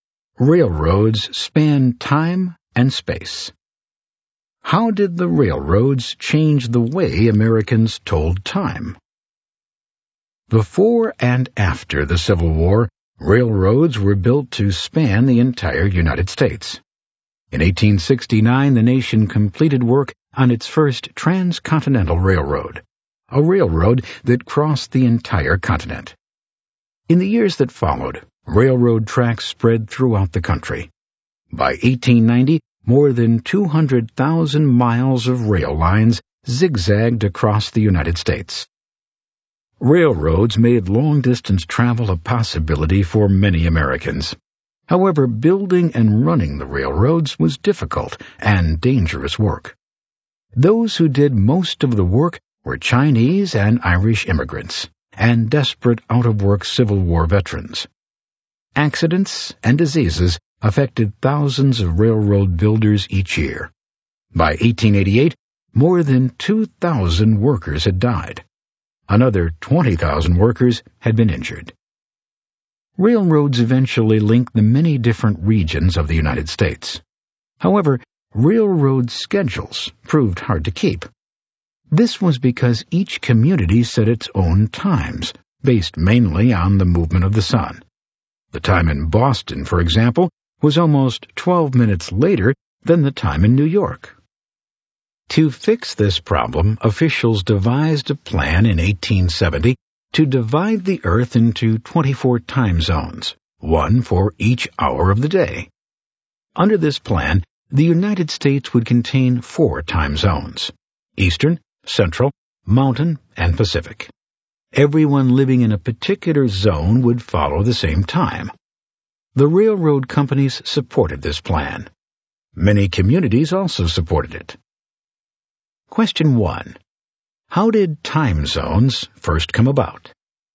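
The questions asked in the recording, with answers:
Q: How did time zones first come about?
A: Railroad schedules were hard to keep because each community set its own time, so in 1870 officials devised a plan dividing the Earth into 24 time zones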